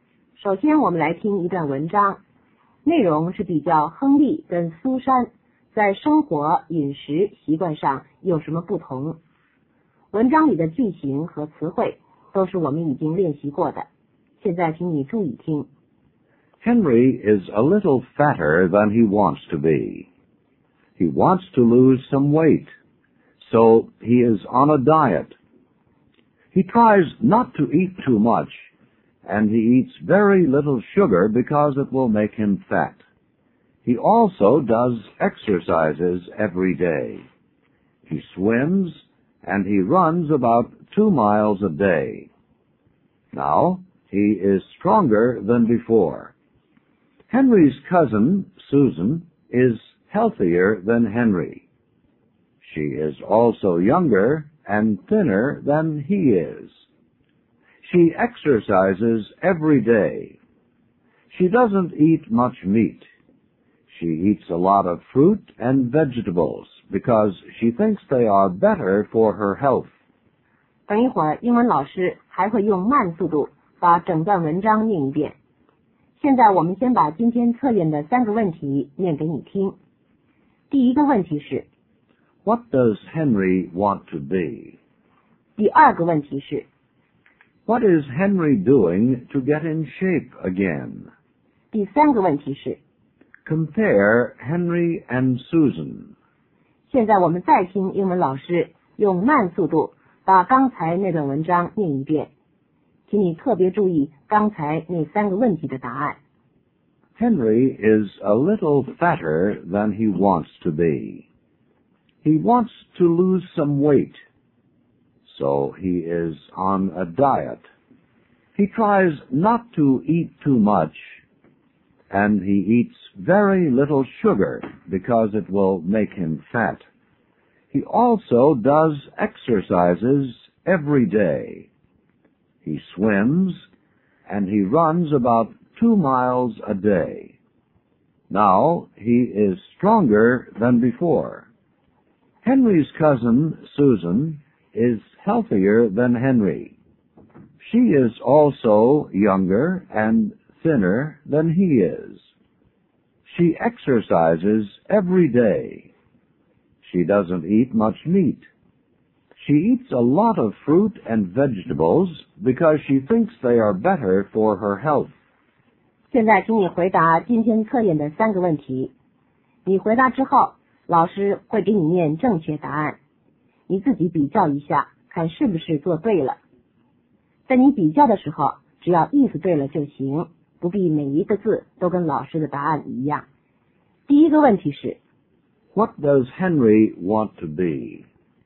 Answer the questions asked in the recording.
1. He wants to be thinner.
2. He tries not to eat too much.
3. Henry is fatter and older. Susan is younger, thinner, and healthier.